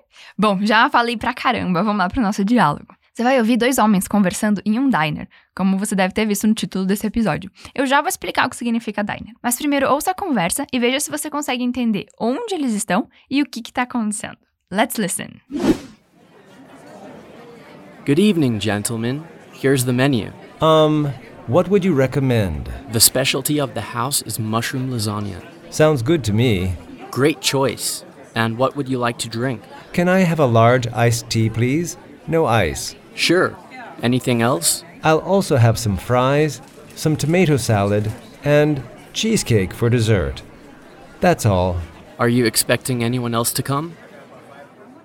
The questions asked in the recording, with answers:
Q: Eu já vou explicar o que significa diner, mas primeiro ouça a conversa e veja se você consegue entender onde eles estão e o que está acontecendo.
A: Você viu que um dos rapazes era um garçom e o outro estava pedindo comida?